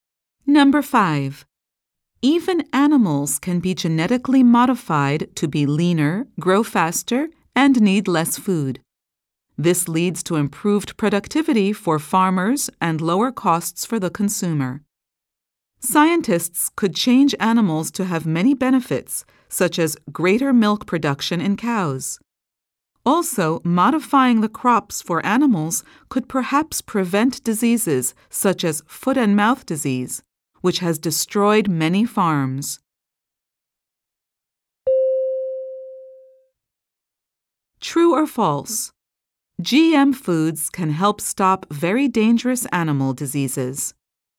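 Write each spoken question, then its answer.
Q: True or false? GM foods can help stop very dangerous animal diseases.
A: True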